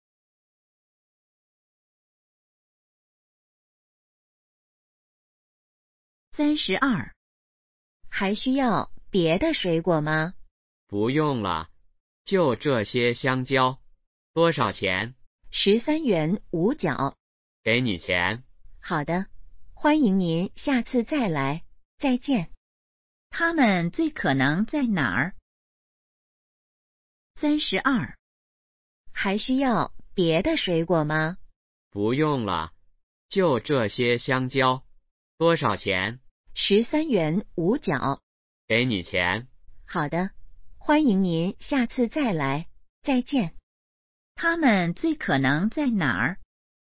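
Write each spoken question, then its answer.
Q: 他们最可能在哪儿?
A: 水果店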